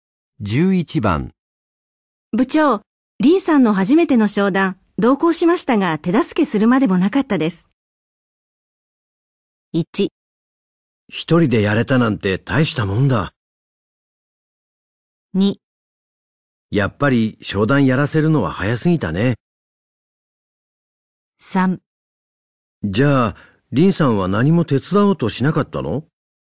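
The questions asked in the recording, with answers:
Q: 部長、リンさんの初めての商談、同行しましたが手助けするまでもなかったです。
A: 1: 一人でやれたなんて大したもんだ。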